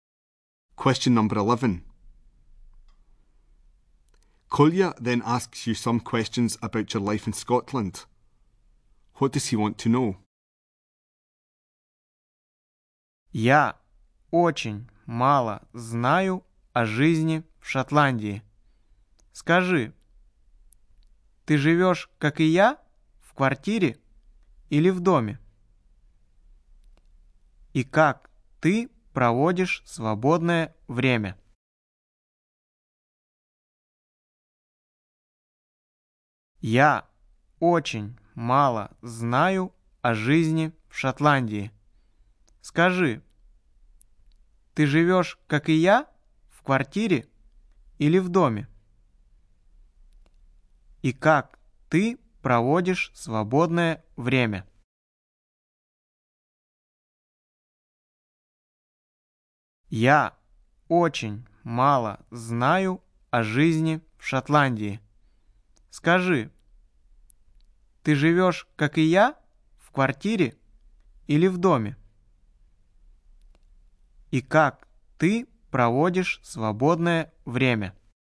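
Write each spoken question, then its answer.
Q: What does he want to know?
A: Whether you live in a flat or a house, and how you spend your free time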